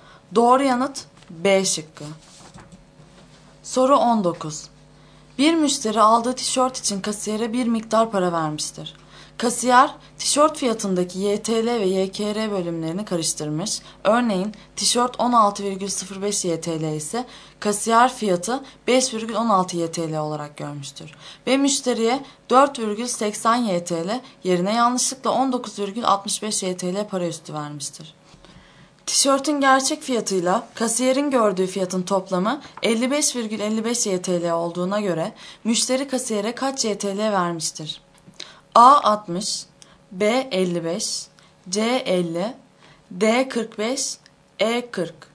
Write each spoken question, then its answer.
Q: Tişörtün gerçek fiyatıyla kasiyerin gördüğü fiyatın toplamı 55,55 YTL olduğuna göre müşteri kasiyere kaç YTL vermiştir?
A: Doğru yanıt E şıkkı.